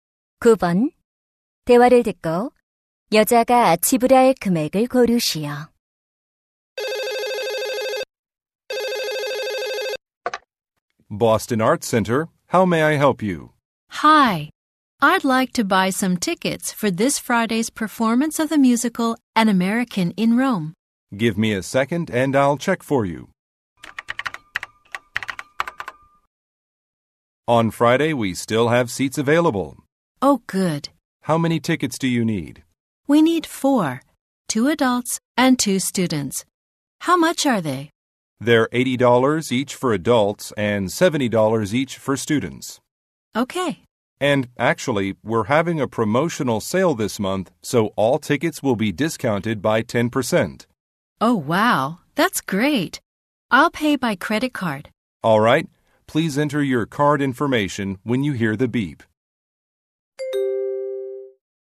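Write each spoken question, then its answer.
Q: 대화를 듣고 여자가 지불할 금액을 고르시오.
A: $270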